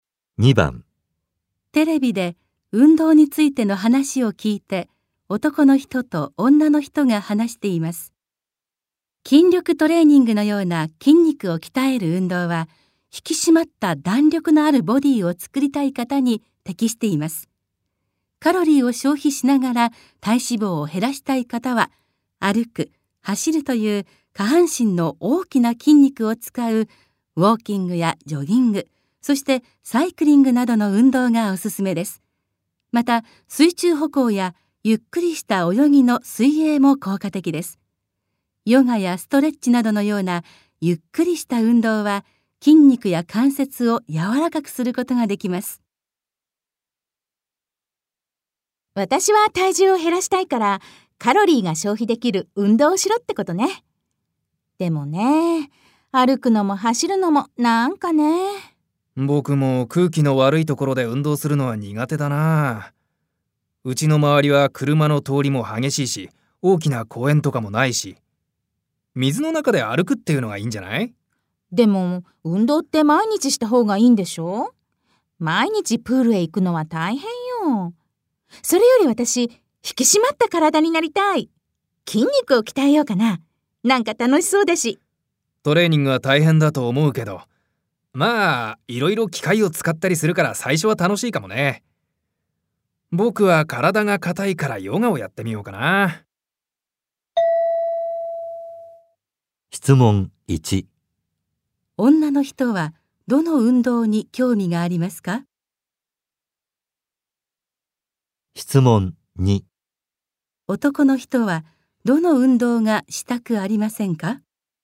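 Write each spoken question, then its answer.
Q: 女の人はどの運動に興味がありますか?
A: 筋肉を鍛える運動(筋力トレーニング)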